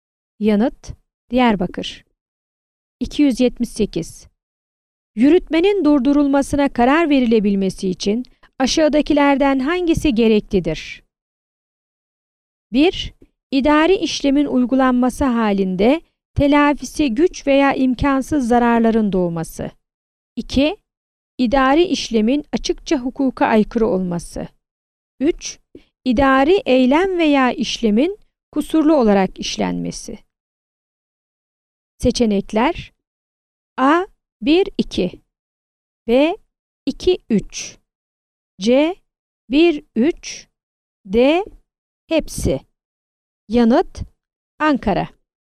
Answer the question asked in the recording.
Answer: Yanıt: Ankara.